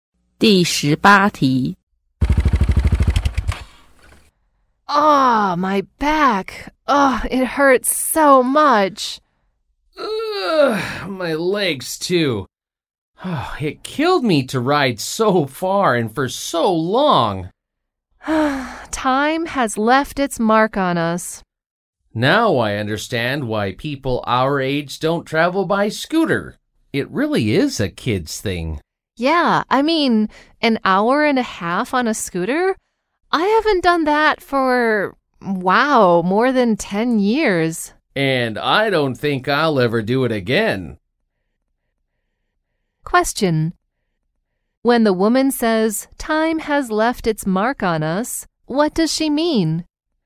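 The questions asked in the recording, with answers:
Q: When the woman says, time has left its mark on us, what does she mean?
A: They have grown older and are no longer fit for riding a scooter.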